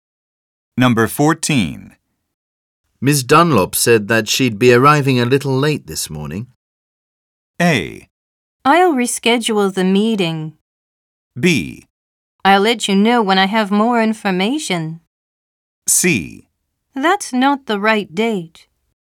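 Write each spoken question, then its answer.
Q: Ms. Dunlop said that she'd be arriving a little late this morning.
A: A: I'll reschedule the meeting.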